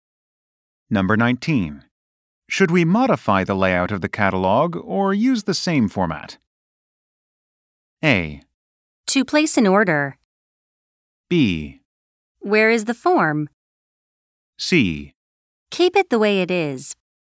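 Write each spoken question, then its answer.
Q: Should we modify the layout of the catalog or use the same format?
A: C: Keep it the way it is.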